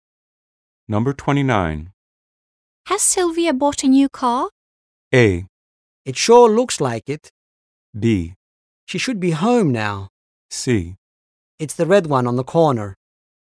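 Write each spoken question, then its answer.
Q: Has Sylvia bought a new car?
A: A: It sure looks like it.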